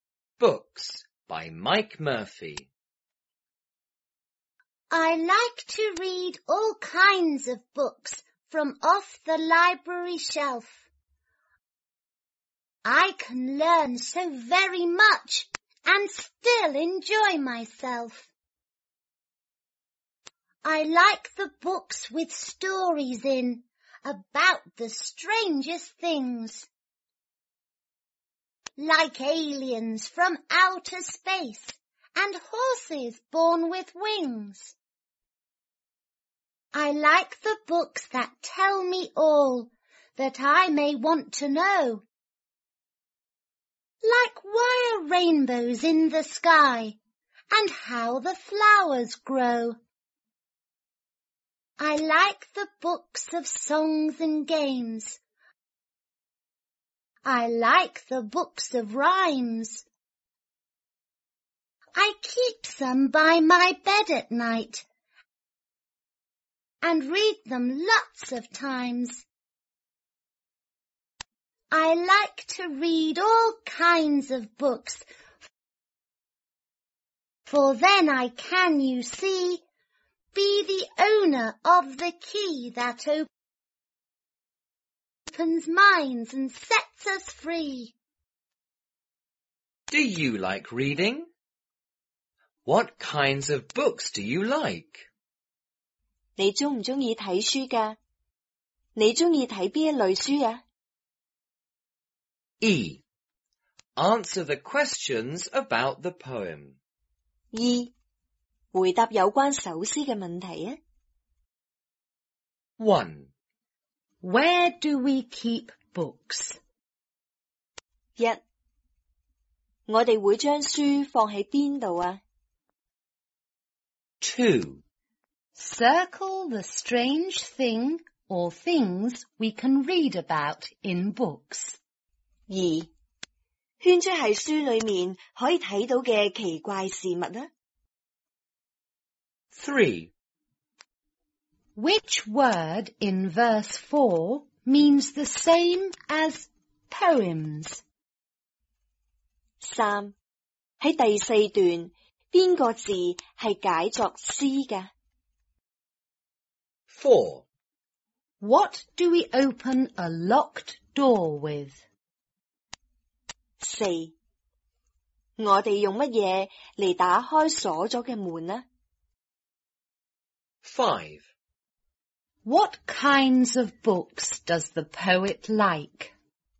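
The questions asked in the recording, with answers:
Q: Where do we keep books?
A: On the library shelf

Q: Which word in verse 4 means the same as poems?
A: rhymes

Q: What do we open a locked door with?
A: a key

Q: What kinds of books does the poet like?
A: All kinds of books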